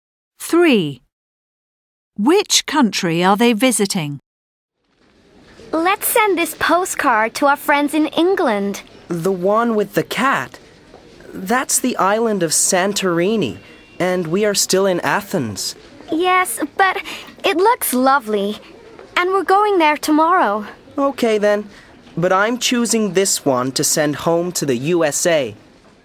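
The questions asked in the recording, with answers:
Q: Which country are they visiting?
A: Greece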